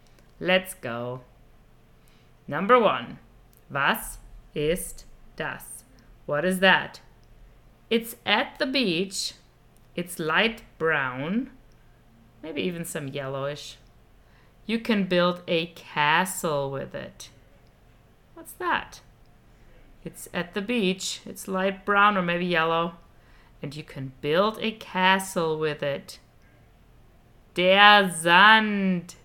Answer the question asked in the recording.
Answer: Der Sand.